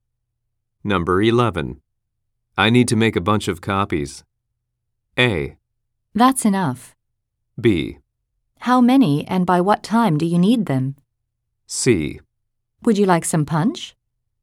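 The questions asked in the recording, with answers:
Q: I need to make a bunch of copies.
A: B: How many and by what time do you need them?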